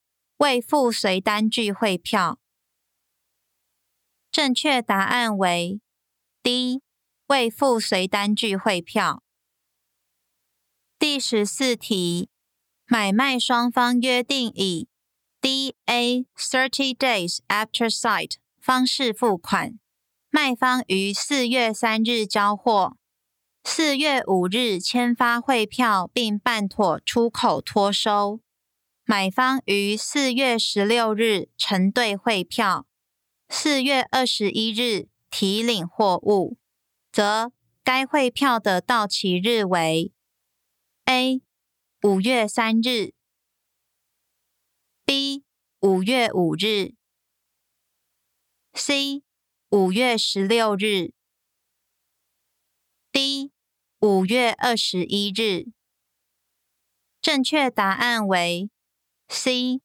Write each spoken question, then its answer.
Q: 则该汇票的到期日为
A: 正确答案为 C.